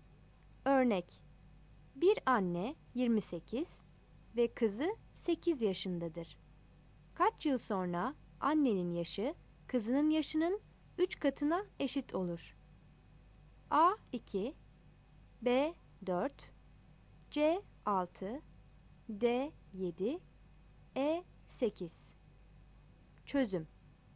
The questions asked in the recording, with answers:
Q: Kaç yıl sonra annenin yaşı kızının yaşının 3 katına eşit olur?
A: Yanıt A'dır.